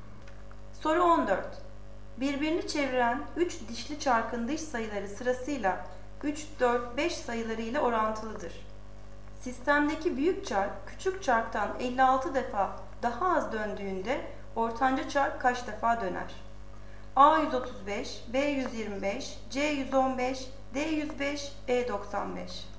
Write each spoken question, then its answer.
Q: Sistemdeki büyük çark küçük çarktan 56 defa daha az döndüğünde ortanca çark kaç defa döner?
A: Doğru cevap D 105.